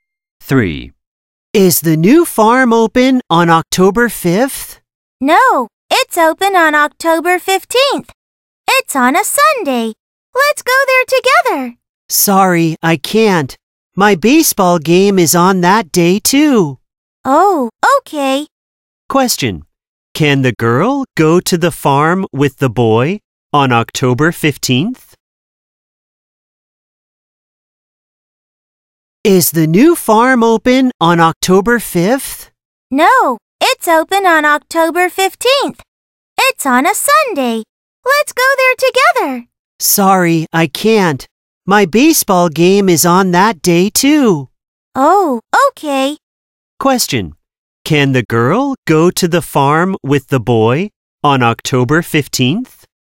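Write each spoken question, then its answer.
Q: Can the girl go to the farm with the boy on October 15th?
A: No, she has a baseball game that day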